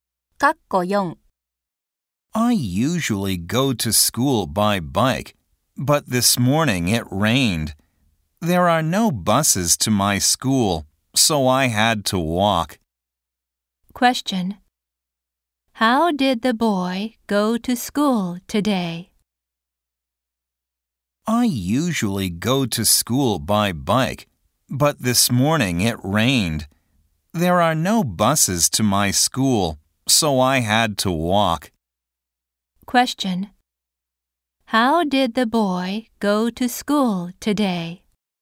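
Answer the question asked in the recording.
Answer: He walked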